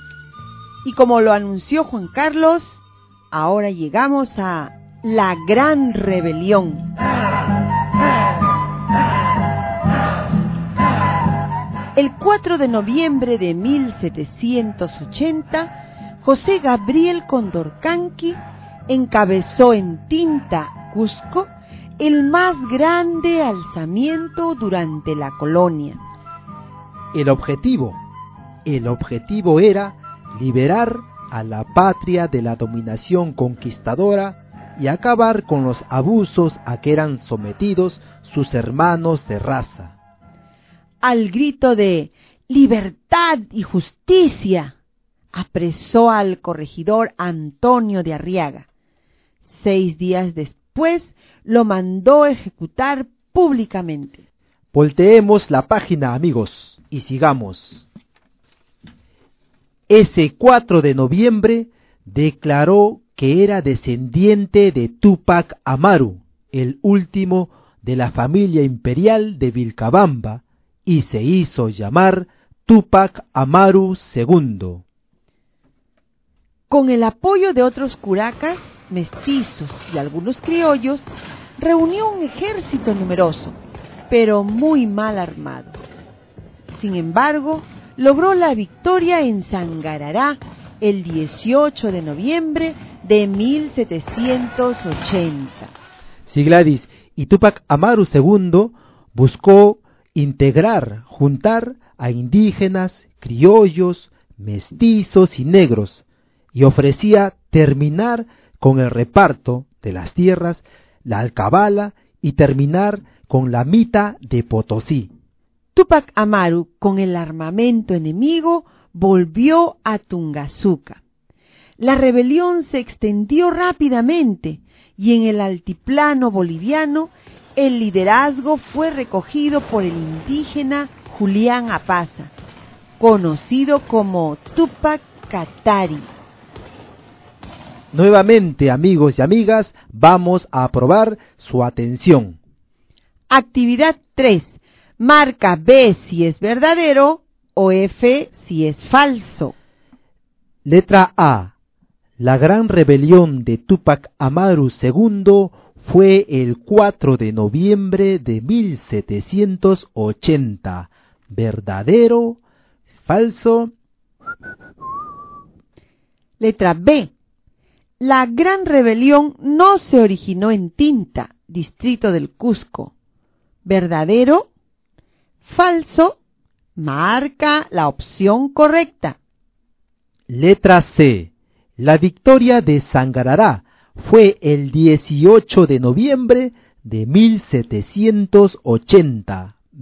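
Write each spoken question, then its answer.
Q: La gran rebelión de Túpac Amaru II fue el 4 de noviembre de 1780.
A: Verdadero

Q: La gran rebelión no se originó en Tinta, distrito del Cusco.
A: Falso

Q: La victoria de Sangarará fue el 18 de noviembre de 1780.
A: Verdadero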